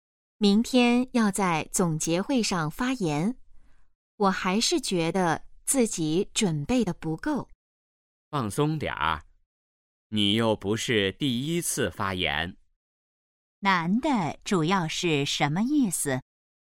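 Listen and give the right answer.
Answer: 让对方放松,不用紧张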